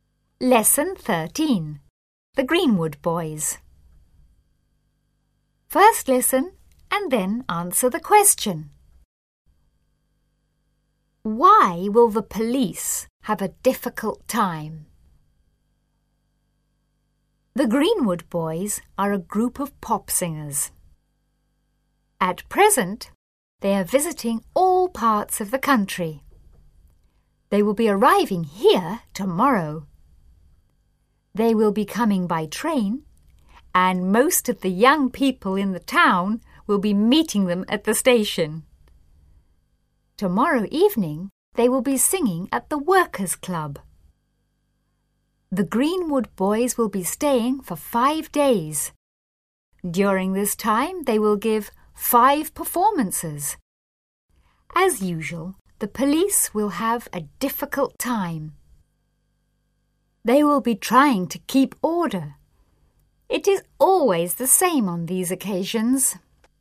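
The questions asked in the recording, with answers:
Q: Why will the police have a difficult time?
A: Because they will be trying to keep order when the Greenwood Boys visit.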